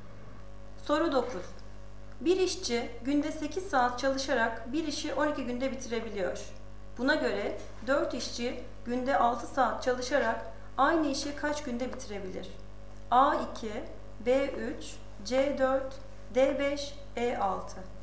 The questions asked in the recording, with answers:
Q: Buna göre 4 işçi günde 6 saat çalışarak aynı işi kaç günde bitirebilir?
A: Doğru cevap C 4.